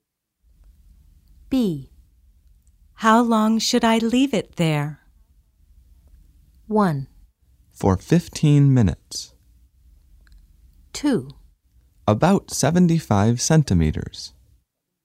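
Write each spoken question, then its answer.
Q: How long should I leave it there?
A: 1: For 15 minutes.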